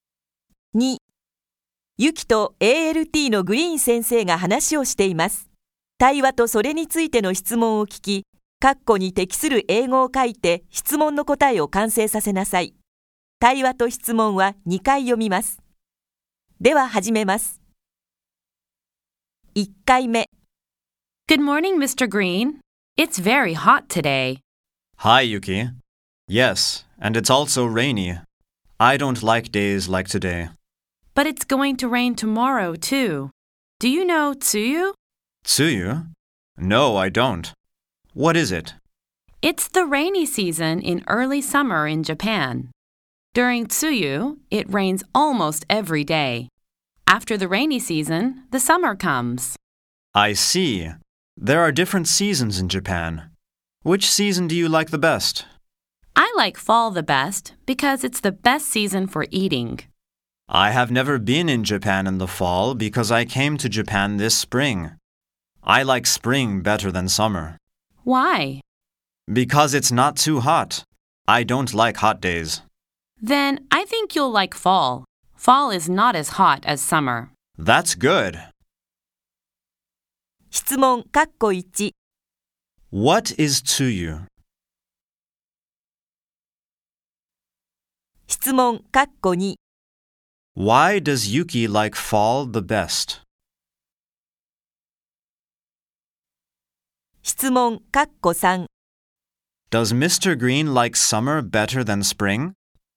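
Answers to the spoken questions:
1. It's the rainy season in early summer in Japan.
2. Because it's the best season for eating.
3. No, he doesn't.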